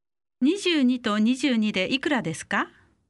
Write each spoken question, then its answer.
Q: 22と22でいくらですか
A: 44